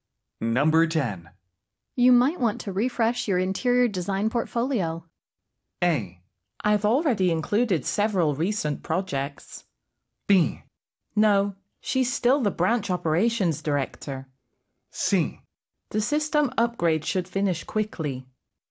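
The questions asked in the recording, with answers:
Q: You might want to refresh your interior design portfolio.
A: A: I've already included several recent projects.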